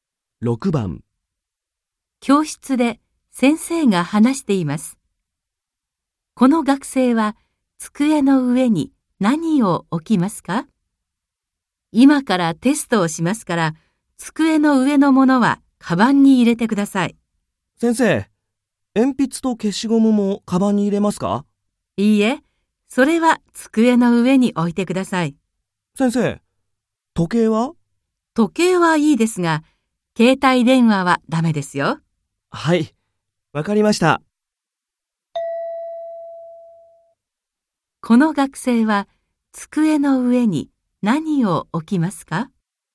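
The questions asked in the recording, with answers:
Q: この学生は机の上に何を置きますか?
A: 鉛筆と消しゴムと時計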